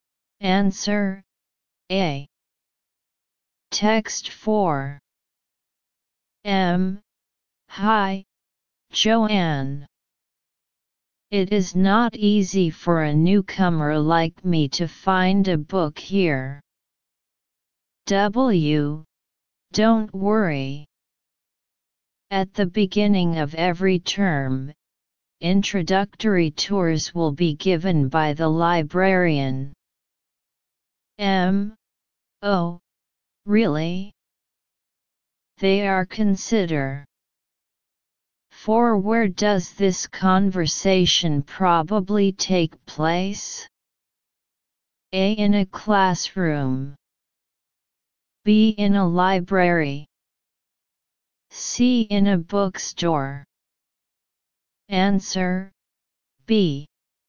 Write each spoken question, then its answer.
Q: Where does this conversation probably take place?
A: Answer, B.